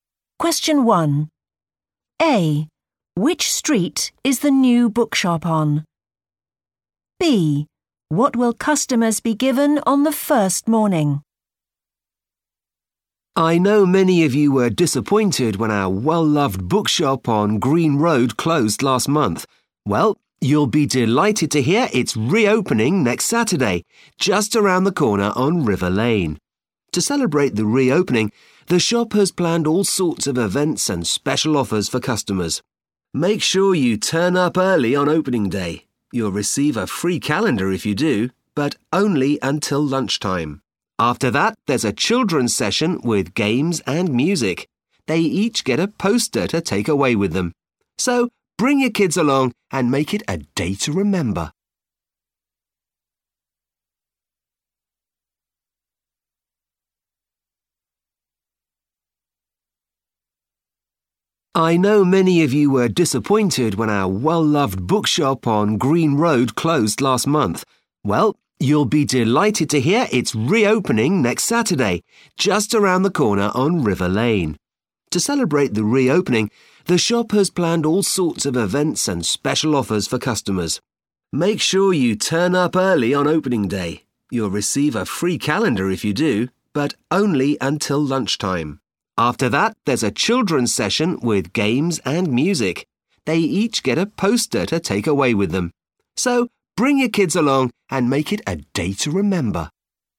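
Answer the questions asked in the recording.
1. River Lane
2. a free calendar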